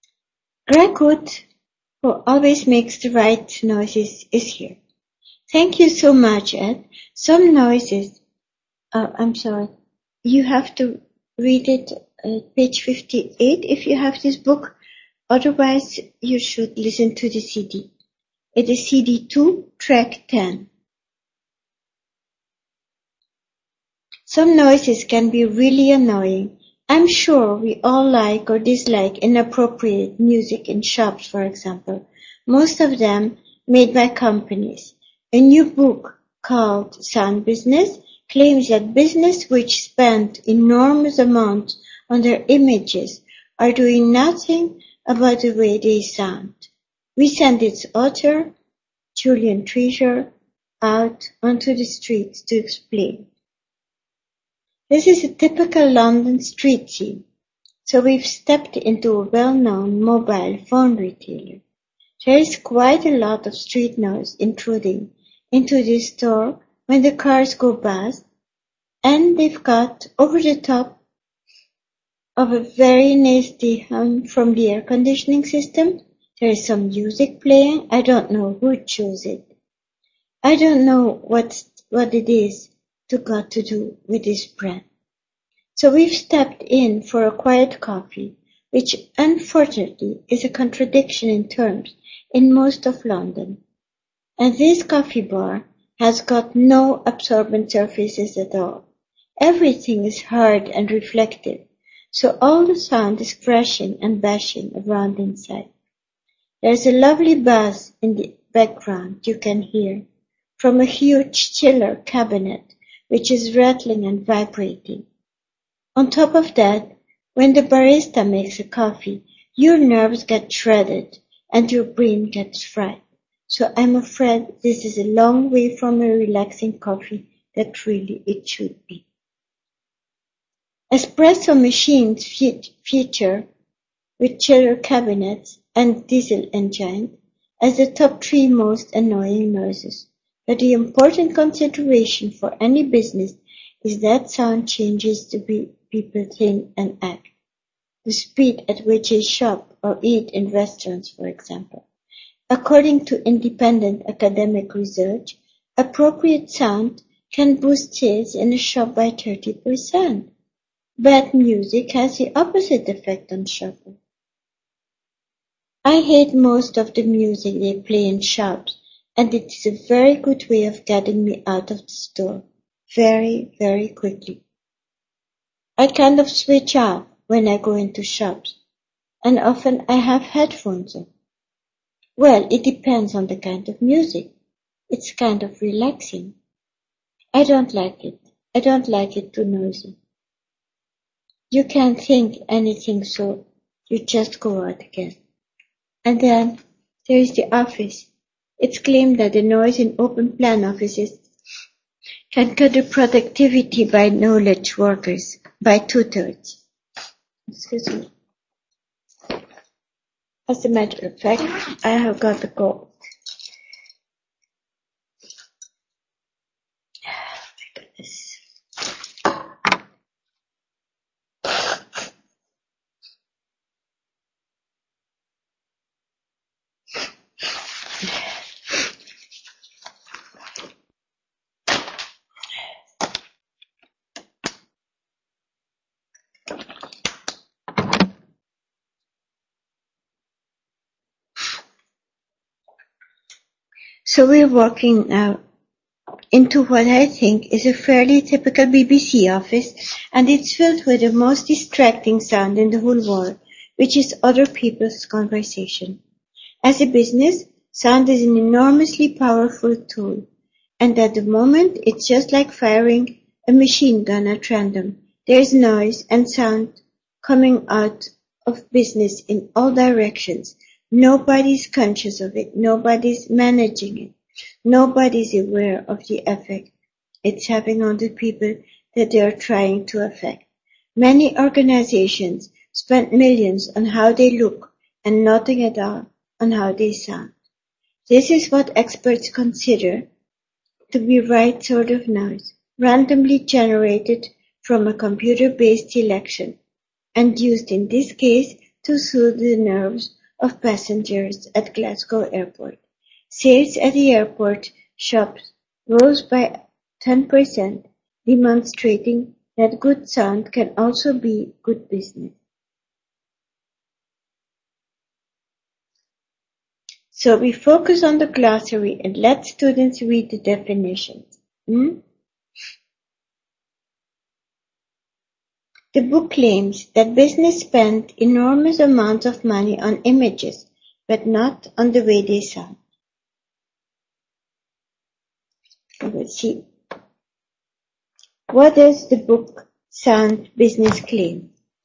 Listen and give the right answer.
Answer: So the book sound business claim that we spend too little on sound and too much on image.